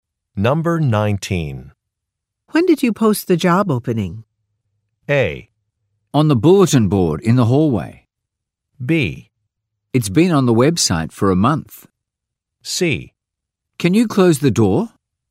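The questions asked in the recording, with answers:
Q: When did you post the job opening?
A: B: It's been on the website for a month.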